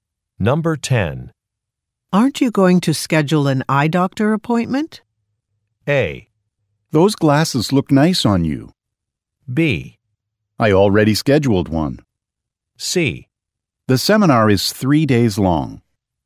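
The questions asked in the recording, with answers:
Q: Aren't you going to schedule an eye doctor appointment?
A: B: I already scheduled one.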